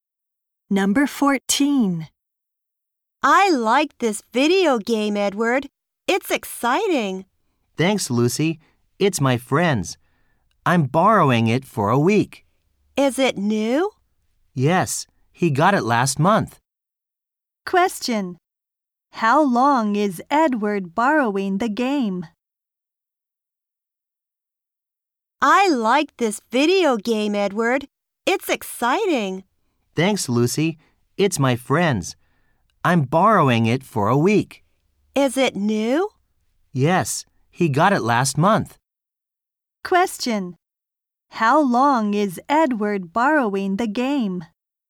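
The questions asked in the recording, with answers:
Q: How long is Edward borrowing the game?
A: For a week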